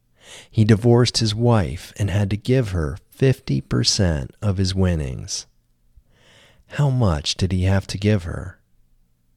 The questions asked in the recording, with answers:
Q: How much did he have to give her?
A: He had to give her 50% of his winnings.